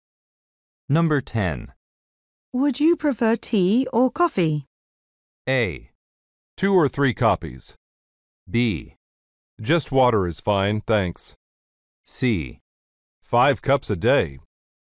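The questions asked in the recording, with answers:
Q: Would you prefer tea or coffee?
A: B: Just water is fine, thanks.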